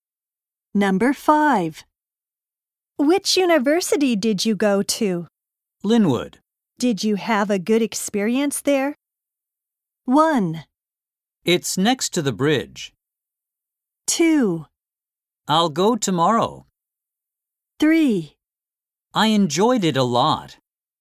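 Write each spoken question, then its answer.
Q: Did you have a good experience there?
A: 3: I enjoyed it a lot.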